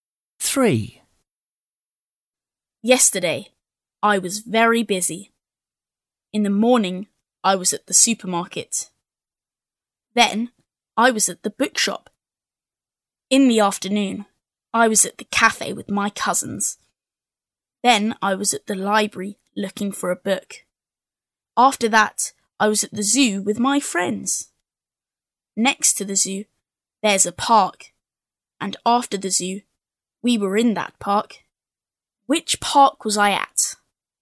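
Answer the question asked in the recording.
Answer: the park next to the zoo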